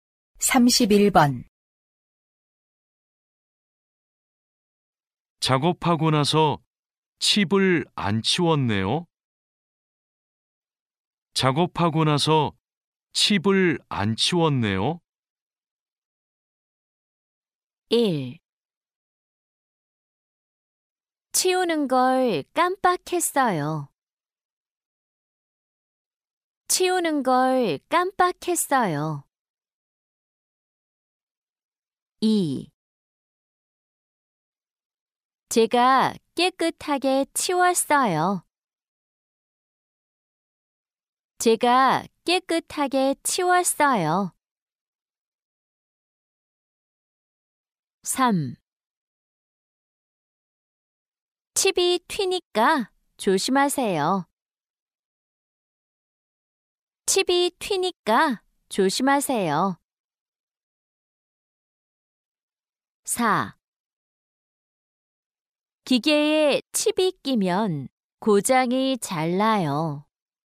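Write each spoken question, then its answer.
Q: 작업하고 나서 칩을 안 치웠네요.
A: 1: 치우는 걸 깜빡했어요.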